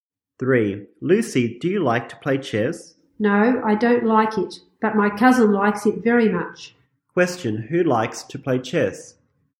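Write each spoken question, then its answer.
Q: Who likes to play chess?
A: Lucy's cousin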